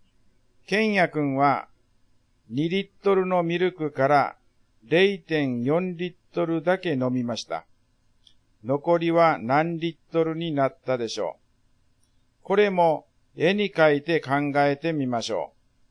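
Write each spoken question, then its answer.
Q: 残りは何リットルになったでしょう。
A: 1.6リットル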